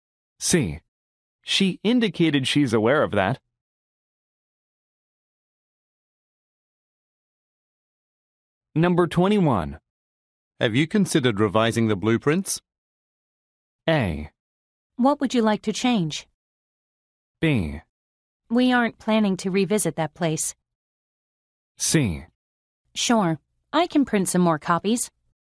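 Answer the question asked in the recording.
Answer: A: What would you like to change?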